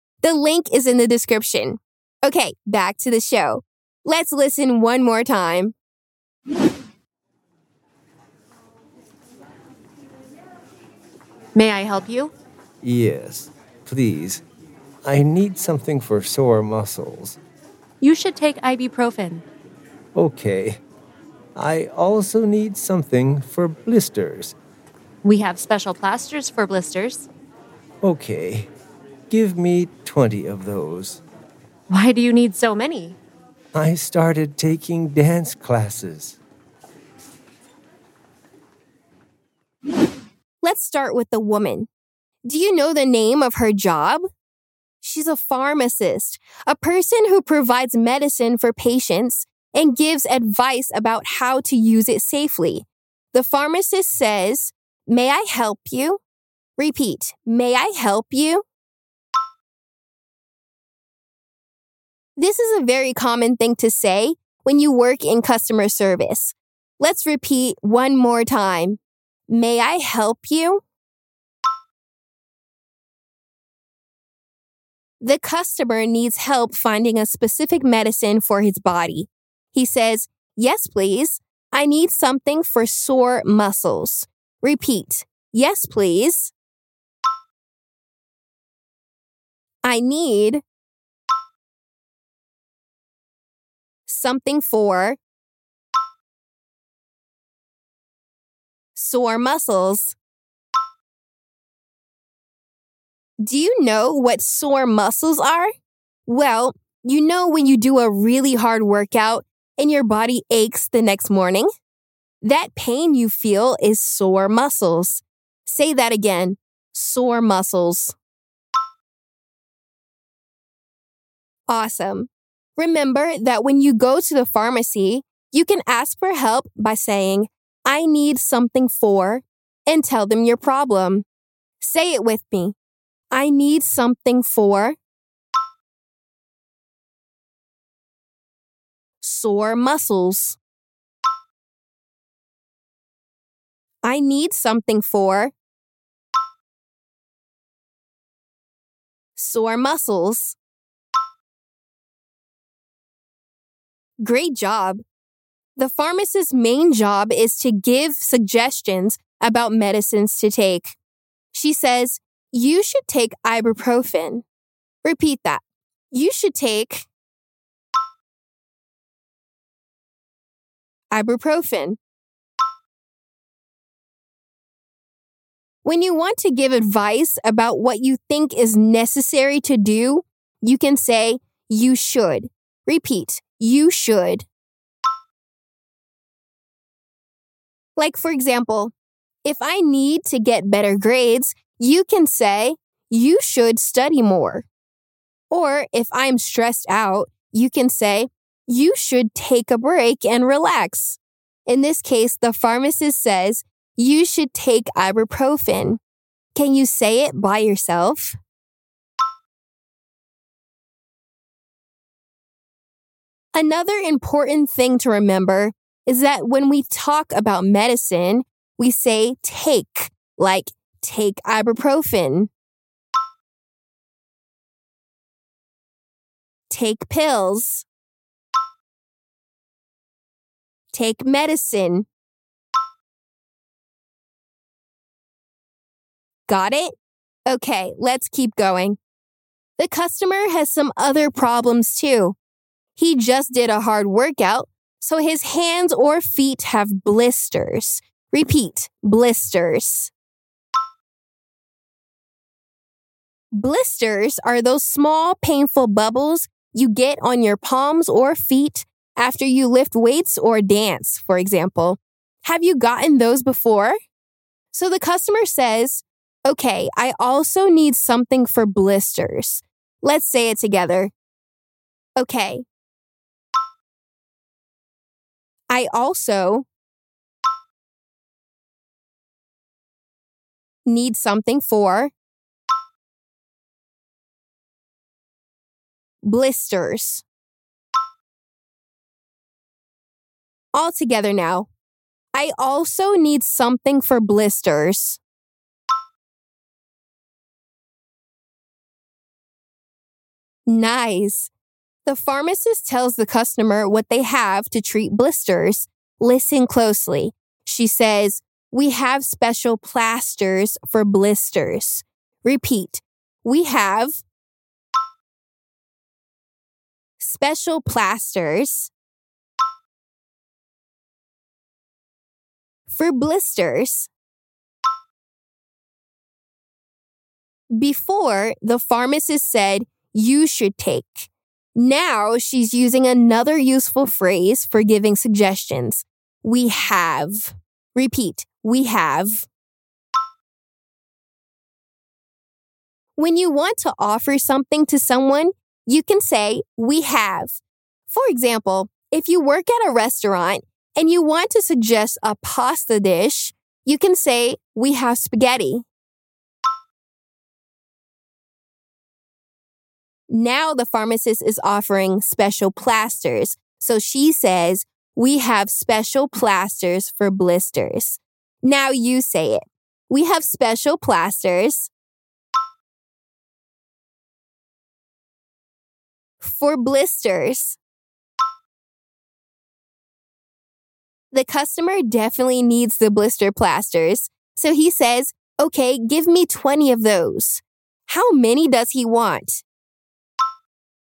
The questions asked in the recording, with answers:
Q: How many does he want?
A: 20. That's so many.